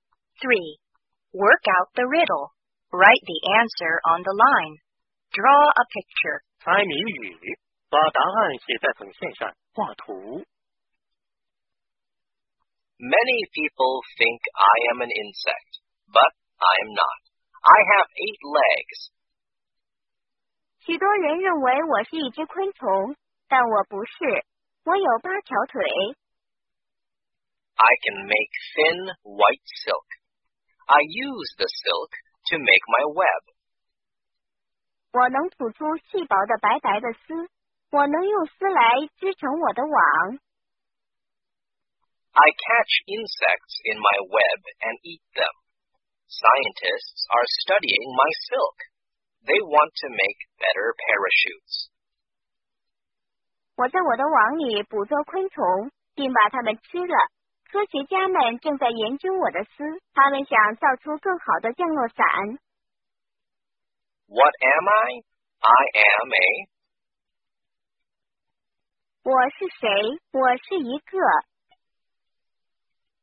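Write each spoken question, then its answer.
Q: What am I? I am a...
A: a spider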